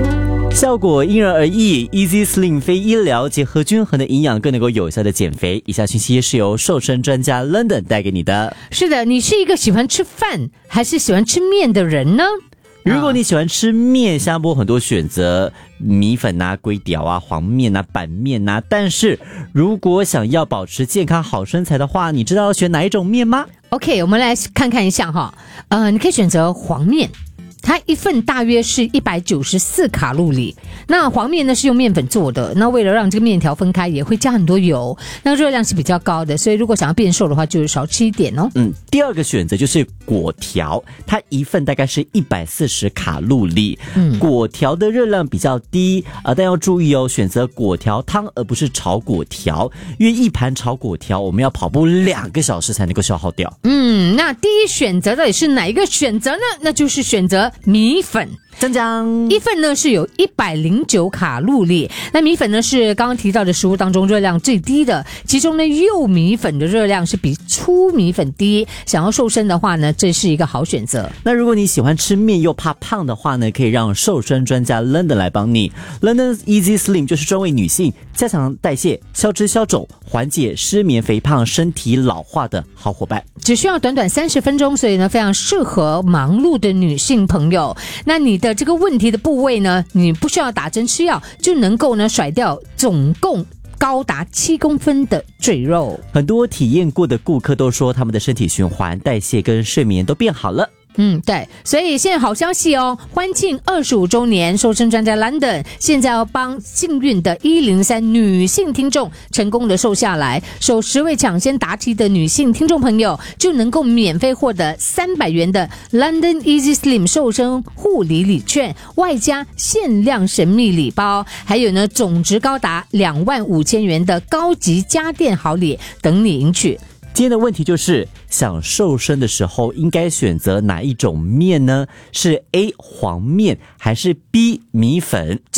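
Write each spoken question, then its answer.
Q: 今天的问题就是,想瘦身的时候应该选择哪一种面呢?是 A 黄面还是 B 米粉?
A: B: 米粉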